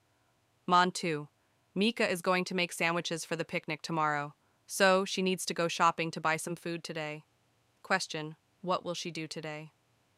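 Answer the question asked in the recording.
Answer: Go shopping to buy some food.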